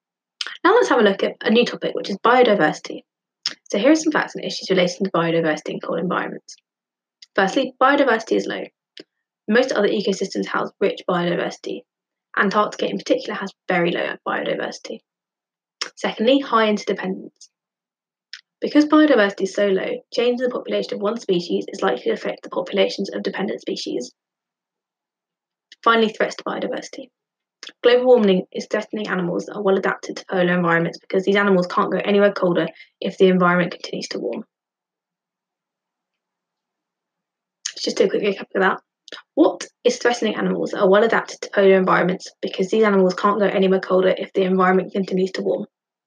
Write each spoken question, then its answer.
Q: What is threatening animals that are well adapted to polar environments because these animals can't go anywhere colder if the environment continues to warm?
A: Correct answer is global warming is threatening these animals.